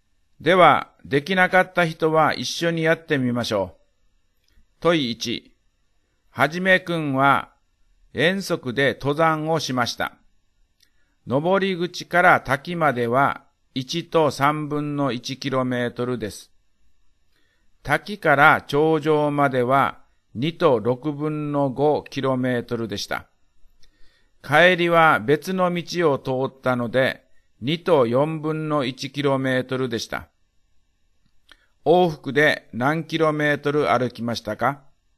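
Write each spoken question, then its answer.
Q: 往復で何キロメートル歩きましたか?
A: 6と12分の5キロメートル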